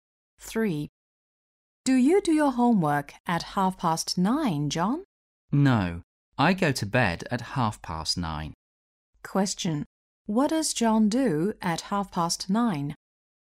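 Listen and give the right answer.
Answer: He goes to bed.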